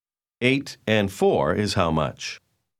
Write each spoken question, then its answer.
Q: 8 and 4 is how much?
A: 12.